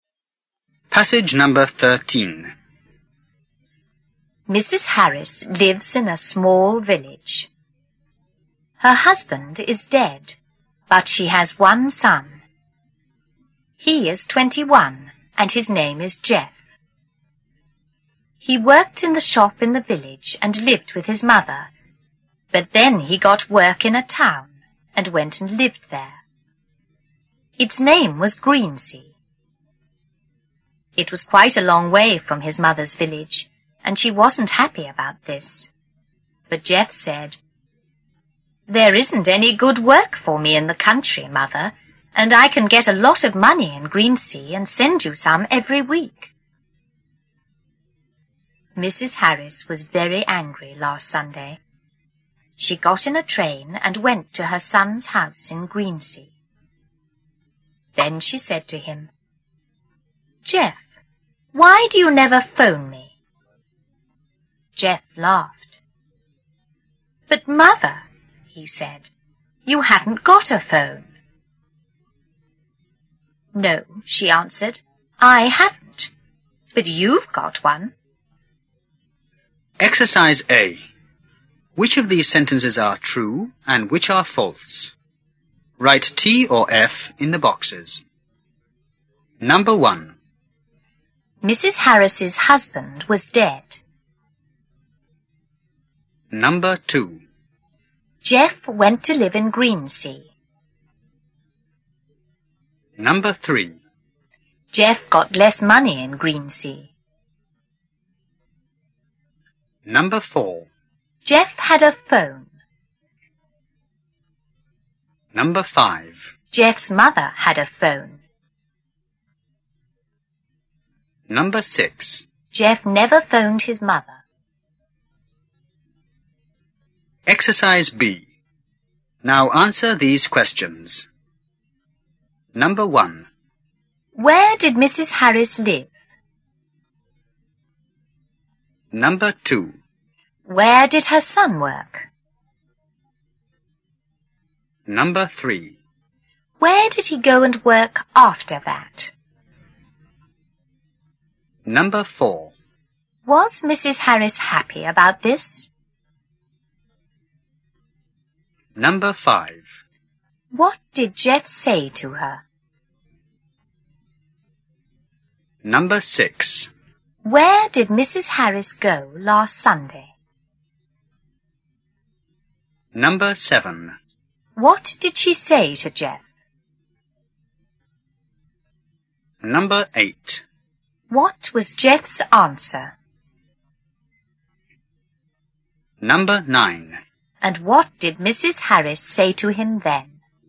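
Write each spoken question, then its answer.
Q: Mrs. Harris's husband was dead.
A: True

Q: Jeff went to live in Greensea.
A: True

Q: Jeff got less money in Greensea.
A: False

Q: Jeff had a phone.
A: True

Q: Jeff's mother had a phone.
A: False

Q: Jeff never phoned his mother.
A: True

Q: Where did Mrs. Harris live?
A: In a small village

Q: Where did her son work?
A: In the shop in the village

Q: Where did he go and work after that?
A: In a town called Greensea

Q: Was Mrs. Harris happy about this?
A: No

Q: What did Jeff say to her?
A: There isn't any good work for him in the country, and he can get a lot of money in Greensea and send her some every week

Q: Where did Mrs. Harris go last Sunday?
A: To her son's house in Greensea

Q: What did she say to Jeff?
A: Jeff, why do you never phone me?

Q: What was Jeff's answer?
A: But Mother, you haven't got a phone.

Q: And what did Mrs. 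Harris say to him then?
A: No, I haven't. But you've got one.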